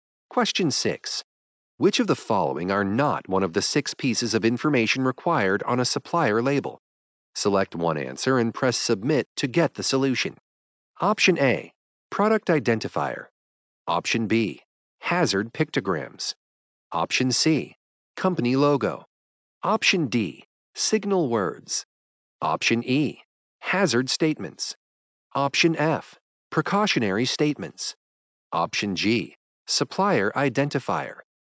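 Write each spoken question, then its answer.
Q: Which of the following are not one of the 6 pieces of information required on a supplier label?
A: C: Company Logo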